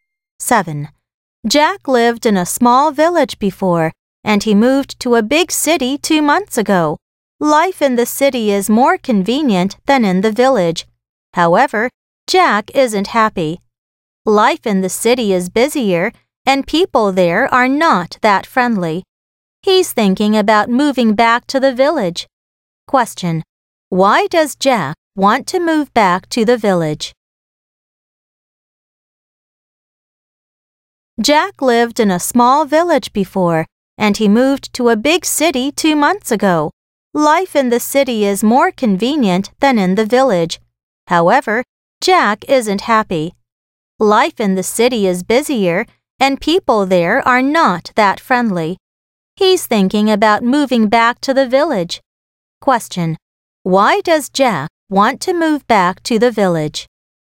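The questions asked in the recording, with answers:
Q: Question. Why does Jack want to move back to the village?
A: City life is busier and people there are not that friendly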